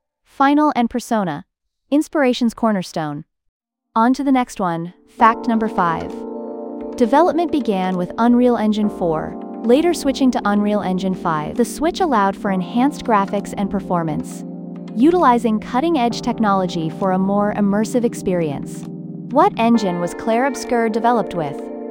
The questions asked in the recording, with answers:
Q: What engine was Clair Obscur developed with?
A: Correct answer, Unreal Engine 5.